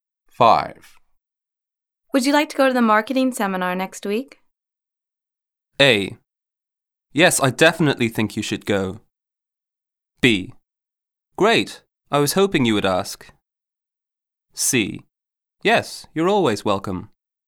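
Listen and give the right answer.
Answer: B: Great, I was hoping you would ask.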